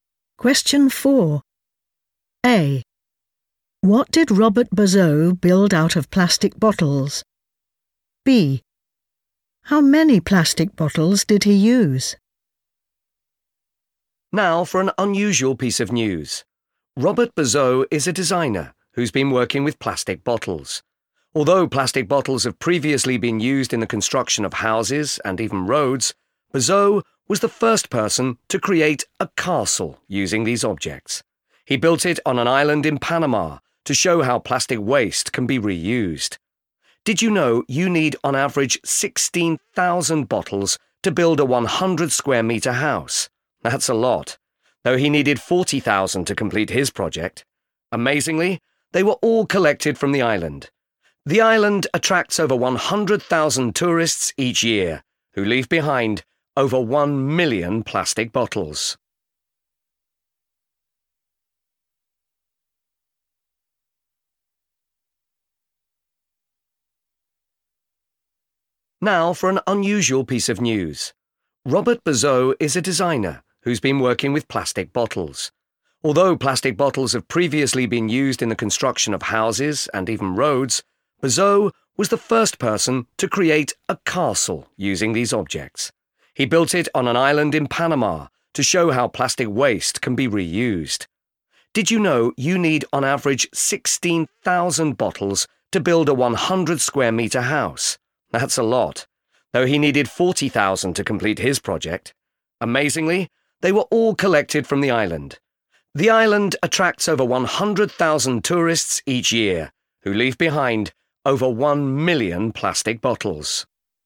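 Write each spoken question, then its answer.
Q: What did Robert Bazot build out of plastic bottles?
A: a castle

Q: How many plastic bottles did he use?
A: 40,000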